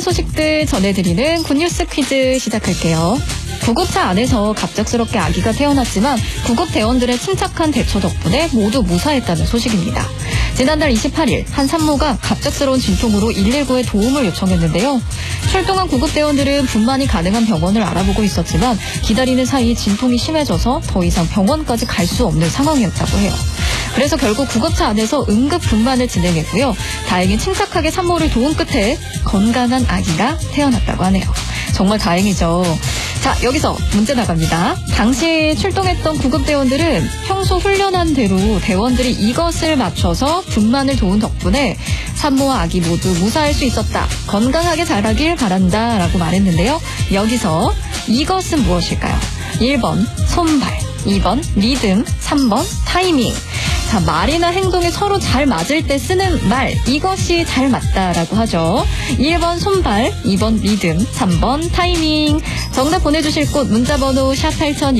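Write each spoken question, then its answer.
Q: 여기서 이것은 무엇일까요?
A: 1: 손발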